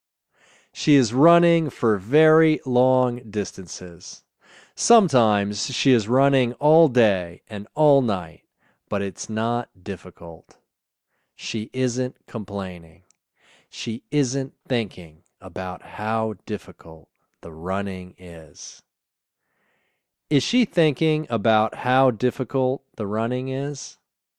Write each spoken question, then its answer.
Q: Is she thinking about how difficult the running is?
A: No. She isn't thinking about how difficult the running is.